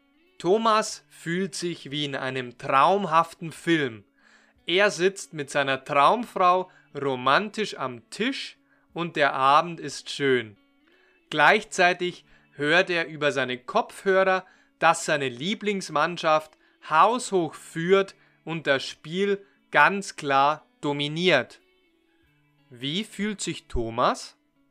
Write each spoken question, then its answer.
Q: Wie fühlt sich Thomas?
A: Wie in einem traumhaften Film.